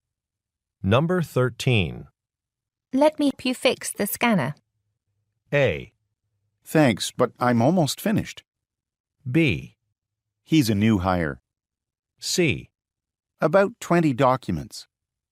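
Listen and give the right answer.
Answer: A: Thanks, but I'm almost finished.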